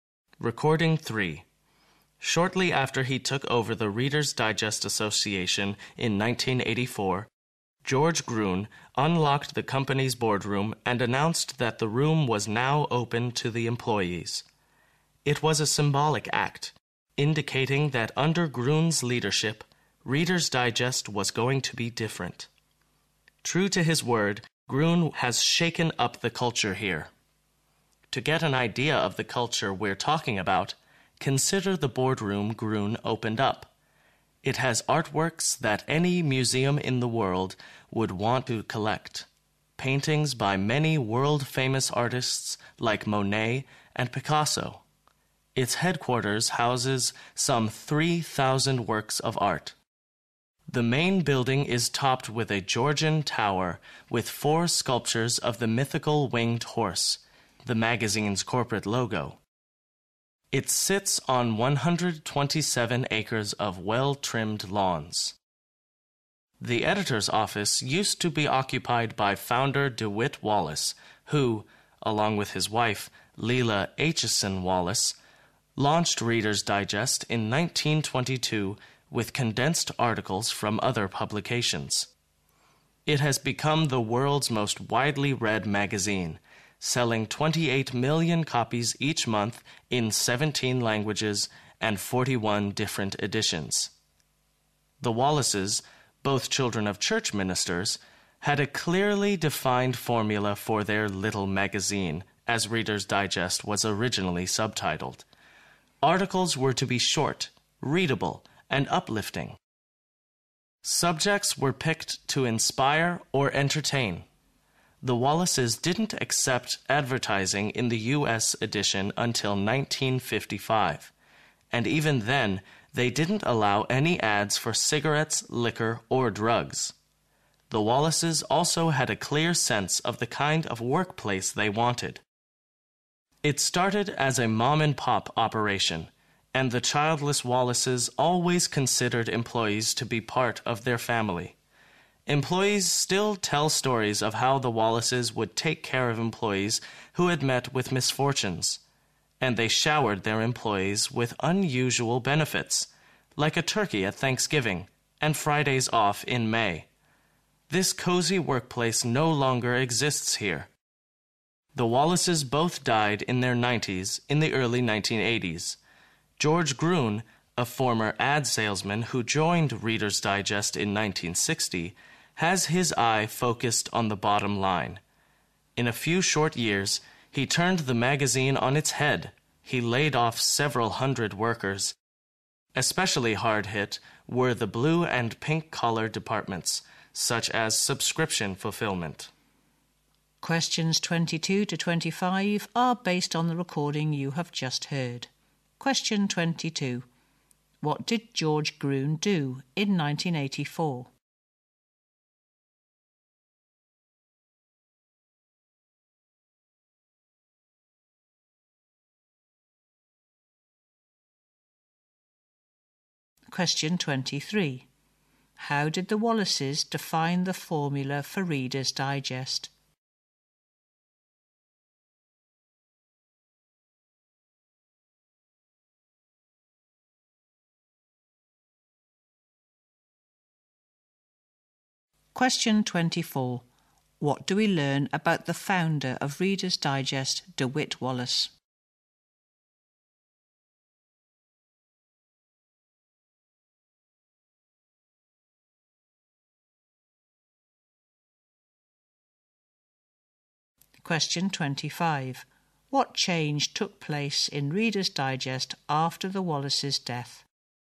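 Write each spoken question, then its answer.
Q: What did George Gruen do in 1984?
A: He opened the company's boardroom to employees

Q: How did the Wallaces define the formula for Reader's Digest?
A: Articles were to be short, readable and uplifting

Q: What change took place in Reader's Digest after the Wallaces' death?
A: Several hundred workers were laid off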